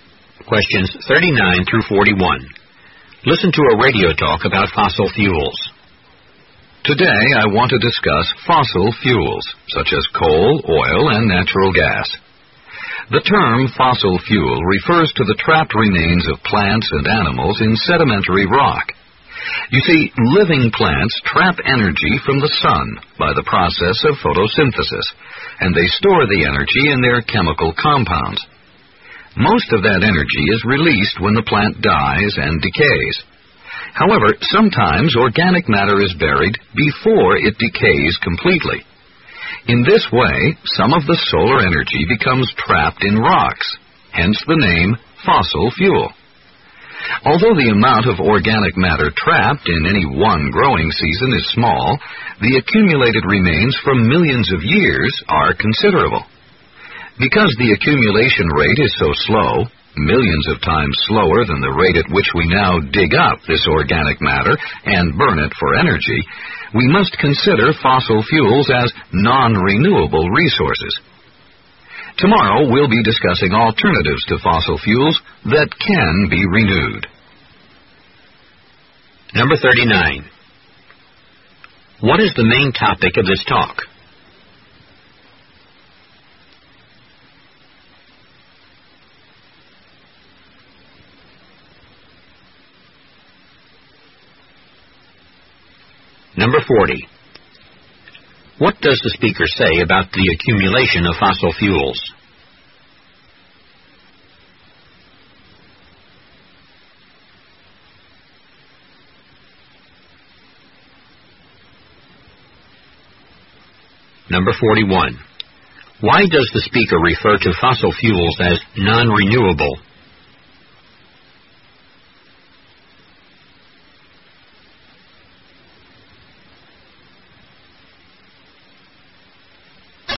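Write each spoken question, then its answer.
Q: What is the main topic of this talk?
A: Fossil fuels

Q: What does the speaker say about the accumulation of fossil fuels?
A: It is very slow, but over millions of years the remains add up to a lot

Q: Why does the speaker refer to fossil fuels as non-renewable?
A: They build up millions of times more slowly than we use them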